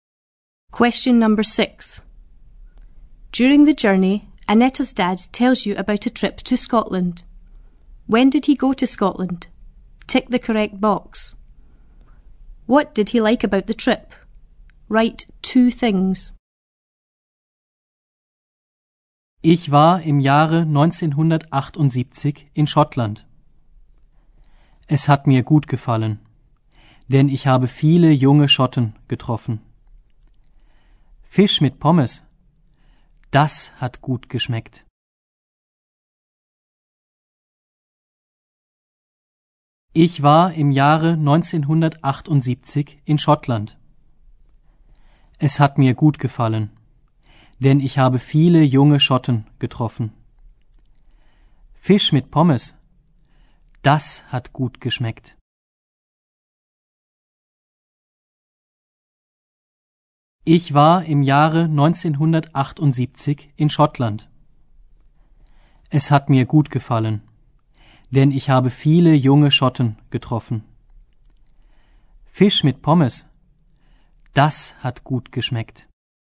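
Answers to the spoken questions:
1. In 1978
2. He met lots of young Scots; the fish and chips tasted good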